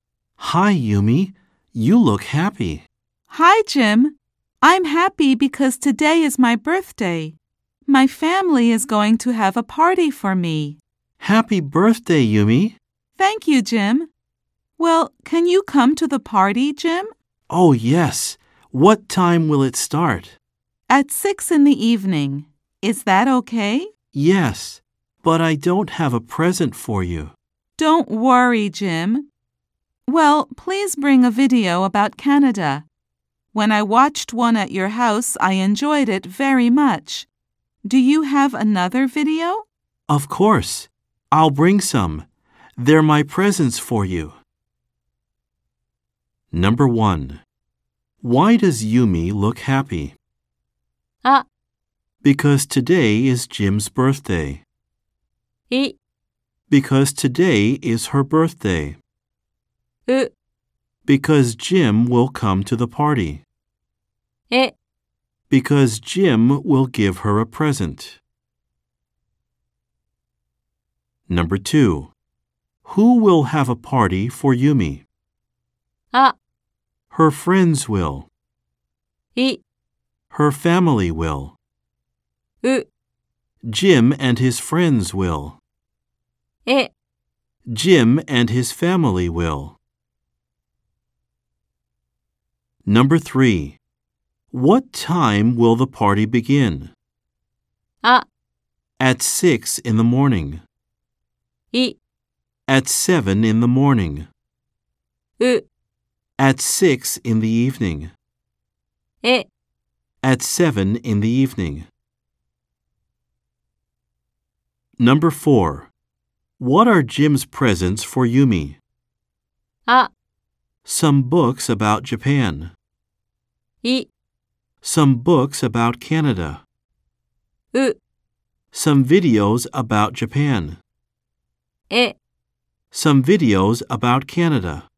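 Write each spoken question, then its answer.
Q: Why does Yumi look happy?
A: い: Because today is her birthday.

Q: Who will have a party for Yumi?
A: い: Her family will.

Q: What time will the party begin?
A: う: At 6 in the evening.

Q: What are Jim's presents for Yumi?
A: え: Some videos about Canada.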